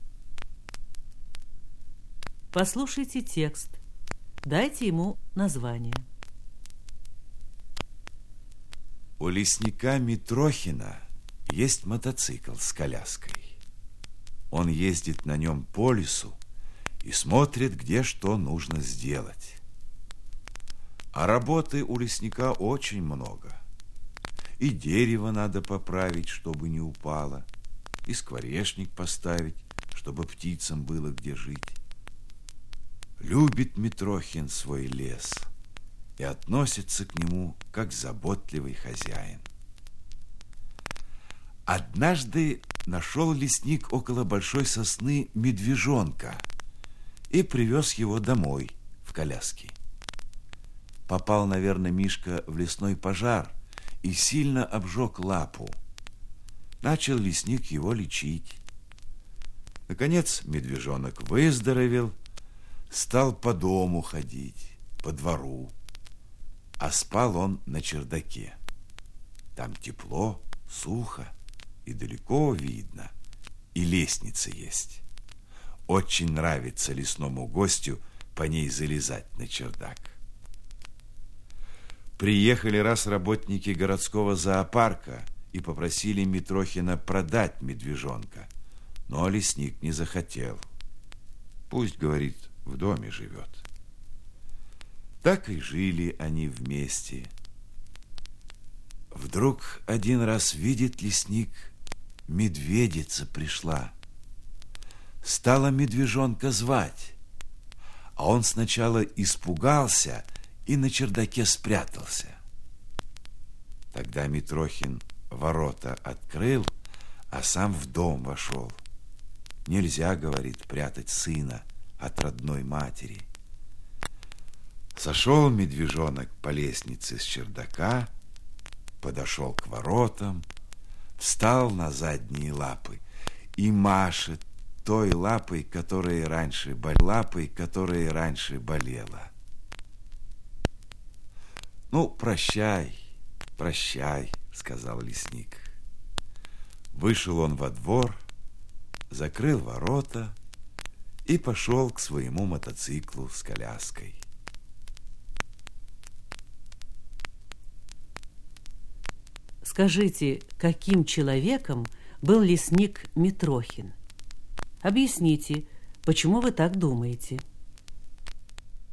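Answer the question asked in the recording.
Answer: Добрым и заботливым, любил лес и животных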